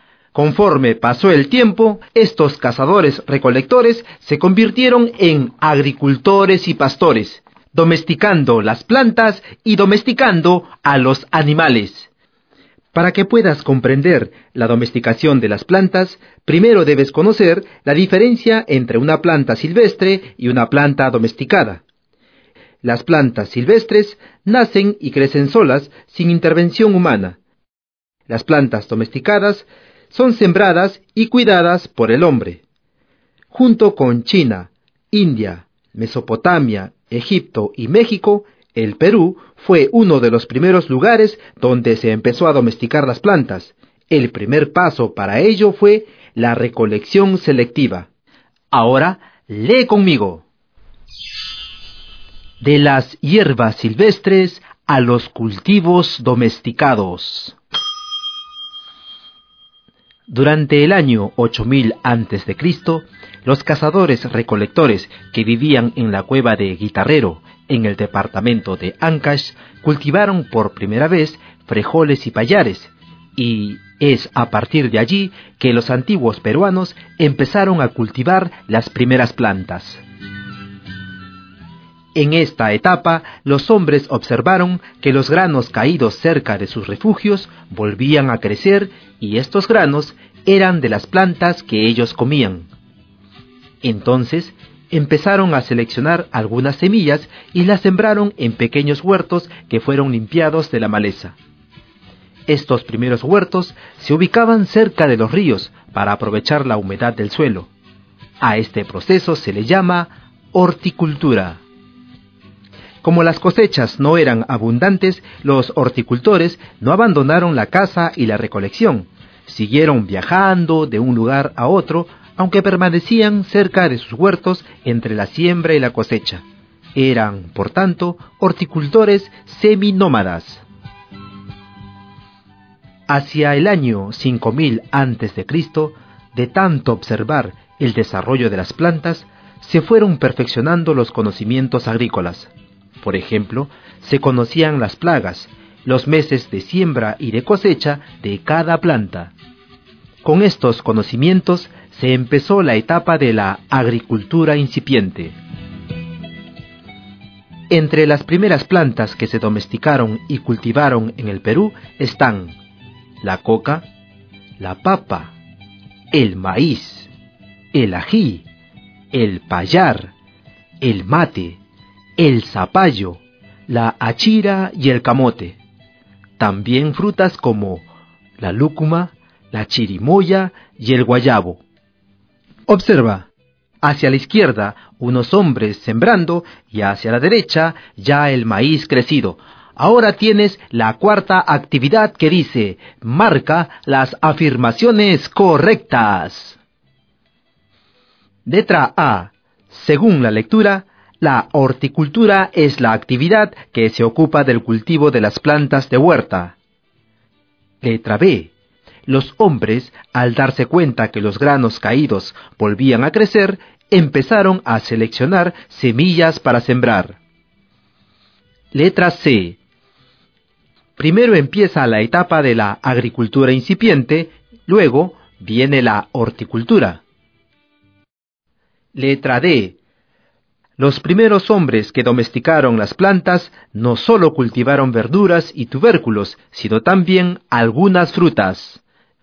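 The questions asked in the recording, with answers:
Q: Letra B. Los hombres, al darse cuenta que los granos caídos volvían a crecer, empezaron a seleccionar semillas para sembrar.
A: Correcta

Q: Letra C. Primero empieza la etapa de la agricultura incipiente, luego viene la horticultura.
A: Incorrecta (primero fue la horticultura)

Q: Letra D. Los primeros hombres que domesticaron las plantas no solo cultivaron verduras y tubérculos, sino también algunas frutas.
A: Correcta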